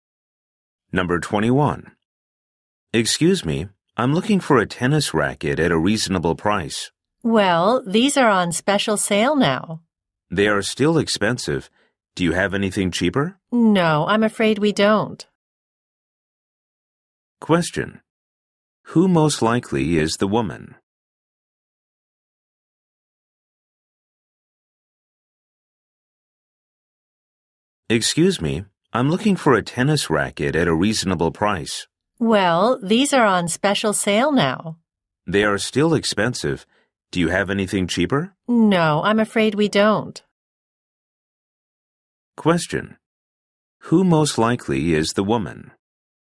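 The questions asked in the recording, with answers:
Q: Who most likely is the woman?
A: A salesclerk at a sports shop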